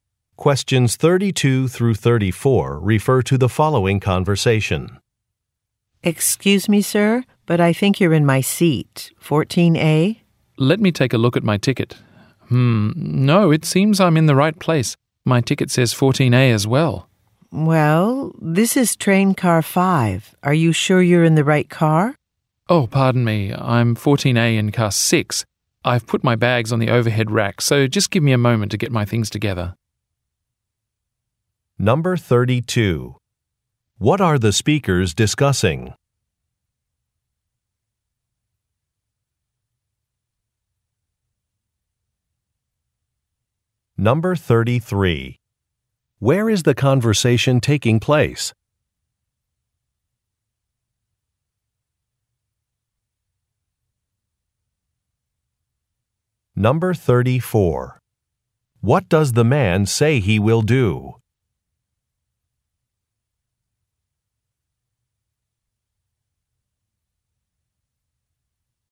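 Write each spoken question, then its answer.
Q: What are the speakers discussing?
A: A seat mix-up (who is in the seat 14A)

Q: Where is the conversation taking place?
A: On a train

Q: What does the man say he will do?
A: Get his things (bags from the overhead rack) together and move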